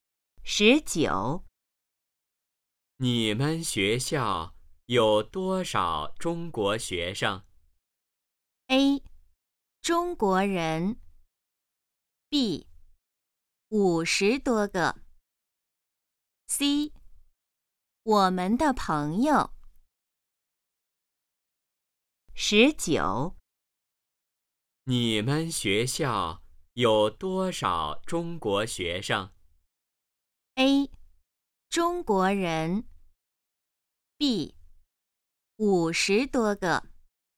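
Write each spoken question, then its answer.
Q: 你们学校有多少中国学生?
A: B: 五十多个。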